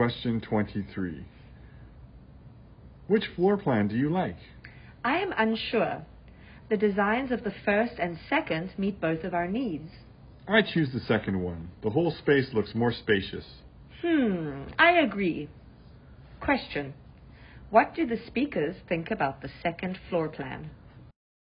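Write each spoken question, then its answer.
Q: What do the speakers think about the second floor plan?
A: They both prefer it; the whole space looks more spacious.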